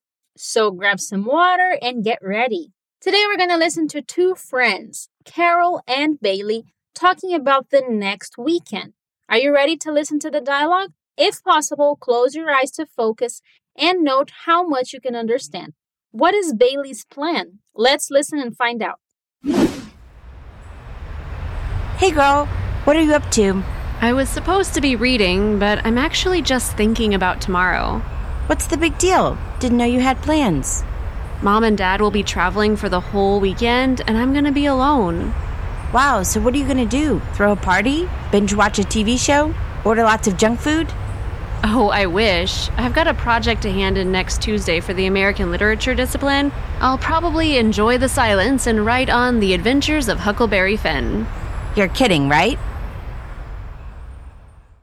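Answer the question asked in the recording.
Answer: To stay home alone and work on her American literature project, writing about The Adventures of Huckleberry Finn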